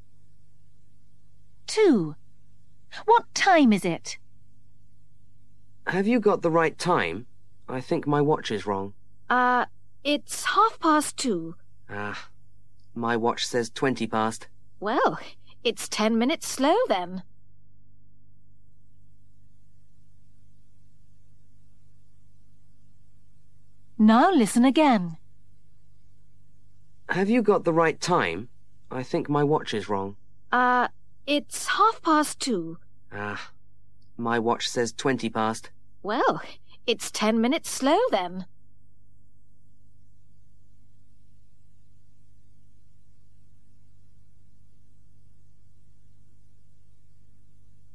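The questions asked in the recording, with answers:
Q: What time is it?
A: 2:30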